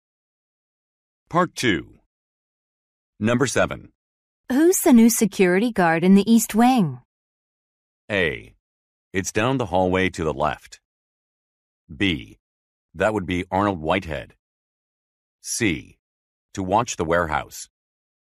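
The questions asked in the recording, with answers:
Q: Who's the new security guard in the East Wing?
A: B: That would be Arnold Whitehead.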